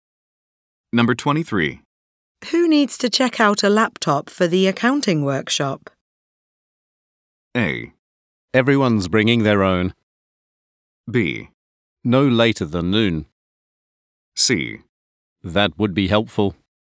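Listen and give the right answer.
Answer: A: Everyone's bringing their own.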